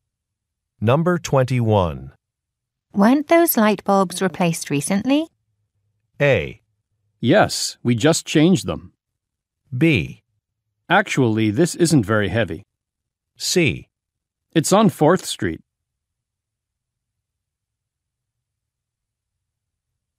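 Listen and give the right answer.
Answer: A: Yes, we just changed them.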